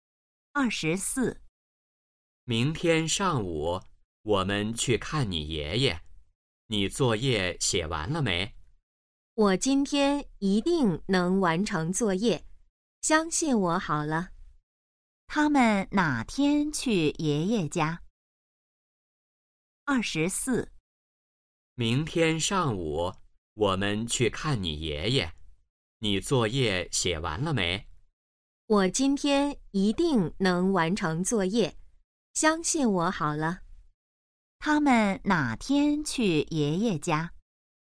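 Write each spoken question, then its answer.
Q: 他们哪天去爷爷家?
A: 明天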